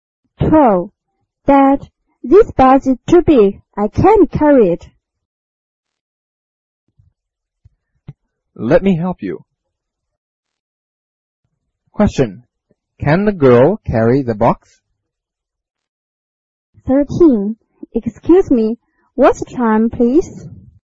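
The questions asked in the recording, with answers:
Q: Can the girl carry the box?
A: No, she can't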